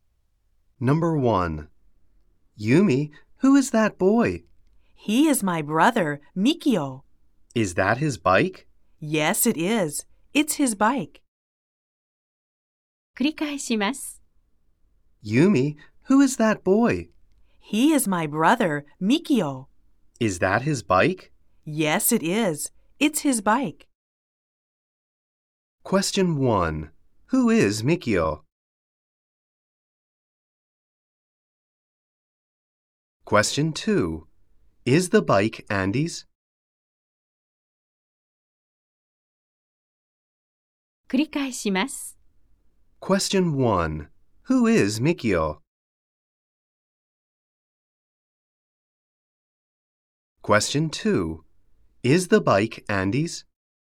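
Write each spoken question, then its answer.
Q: Who is Mikio?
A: He is Yumi's brother.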